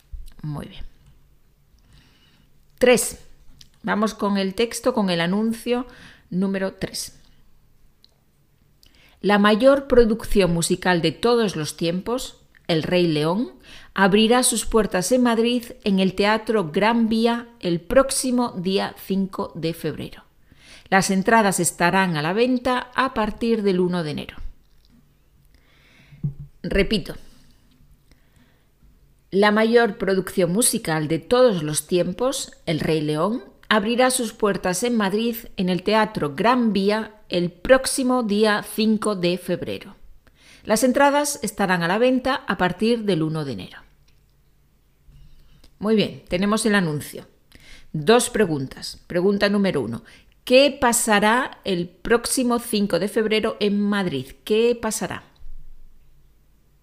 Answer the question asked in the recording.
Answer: El próximo 5 de febrero en Madrid será el estreno del musical El Rey León.